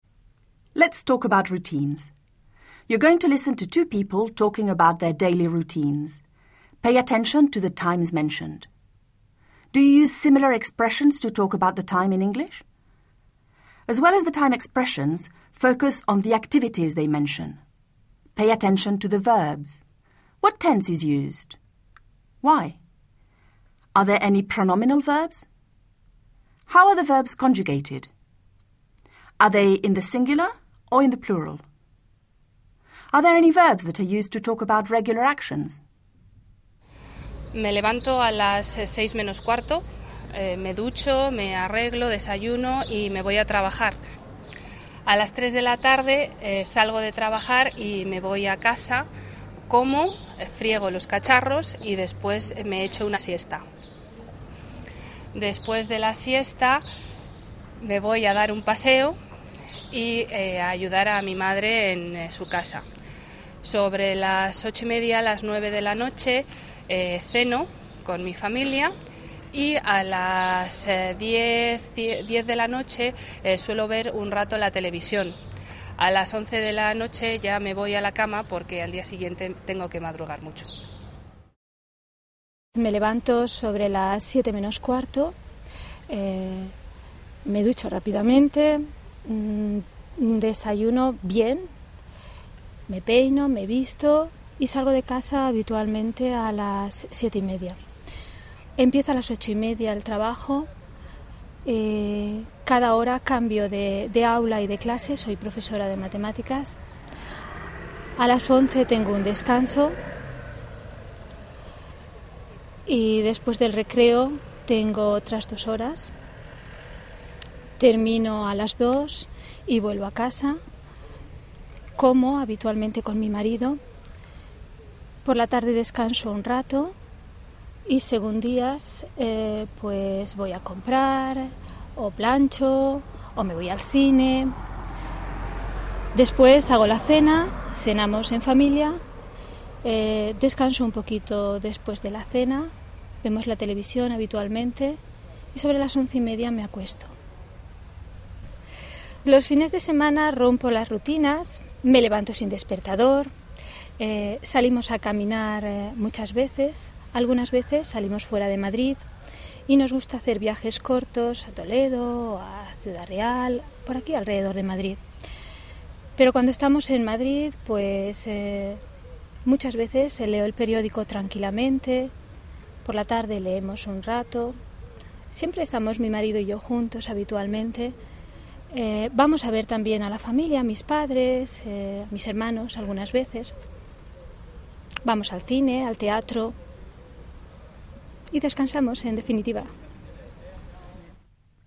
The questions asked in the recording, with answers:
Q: What tense is used?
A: You may have noticed that the simple present tense is used to talk about routines.

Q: Are there any pronominal verbs?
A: Some examples of the pronominal verbs used are me levanto, me ducho, me voy a trabajar, me peino, me visto.

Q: Are they in the singular or in the plural?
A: Both the singular and the plural were used to describe routines.

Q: Are there any verbs that are used to talk about regular actions?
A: One of the speakers said, suelo ver un rato la televisión.